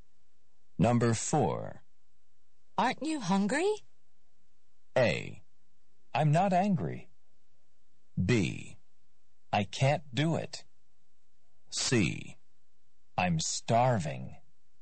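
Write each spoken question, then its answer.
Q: Aren't you hungry?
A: C: I'm starving.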